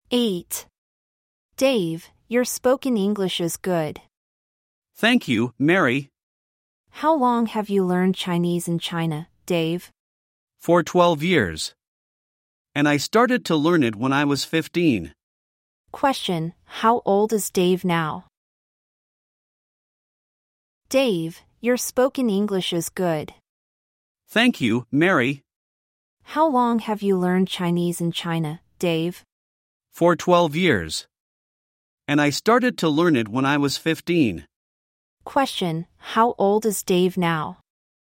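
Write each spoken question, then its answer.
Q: Question, how old is Dave now?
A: 27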